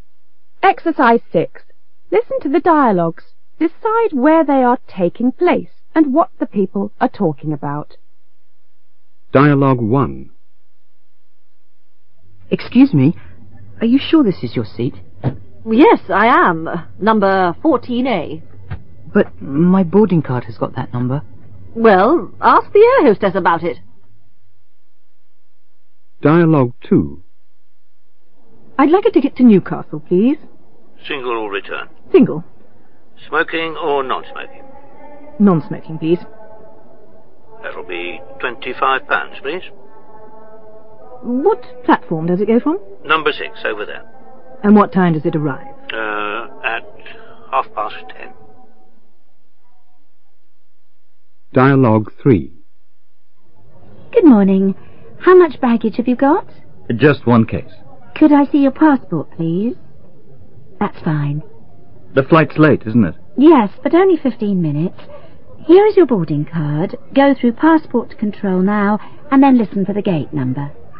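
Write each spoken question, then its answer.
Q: Decide where they are taking place and what the people are talking about.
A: On a plane; two passengers think they have the same seat (14A).

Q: Decide where they are taking place and what the people are talking about.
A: At a train station ticket office; buying a single non-smoking ticket to Newcastle.

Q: Decide where they are taking place and what the people are talking about.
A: At an airport check-in desk; checking in baggage and passport for a flight that is 15 minutes late.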